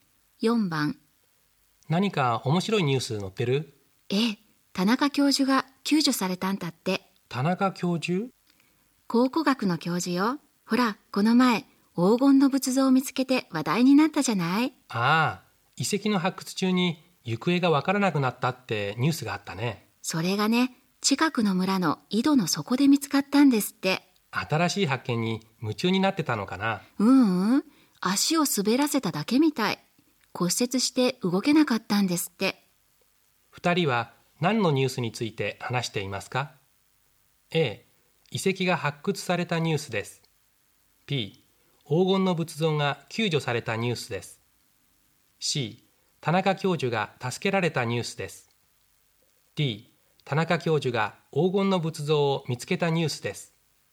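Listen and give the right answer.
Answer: C: 田中教授が助けられたニュースです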